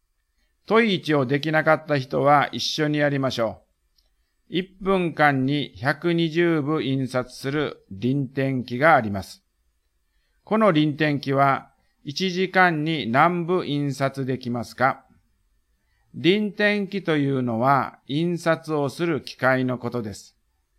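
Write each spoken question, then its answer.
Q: 1分間に120部印刷する輪転機があります。 この輪転機は1時間に何部印刷できますか?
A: 7200部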